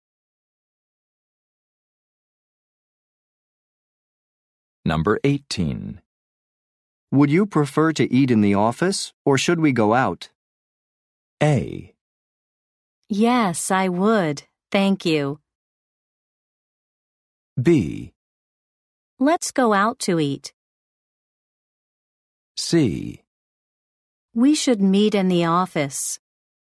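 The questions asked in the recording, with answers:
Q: Would you prefer to eat in the office, or should we go out?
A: B: Let's go out to eat.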